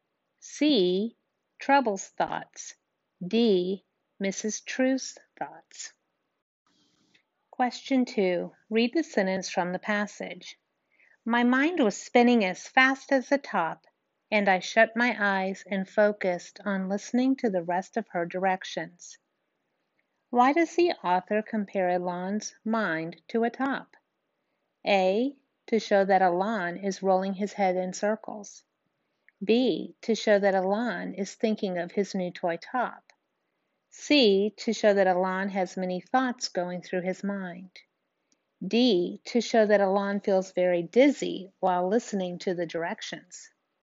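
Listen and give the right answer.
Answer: C: to show that Elan has many thoughts going through his mind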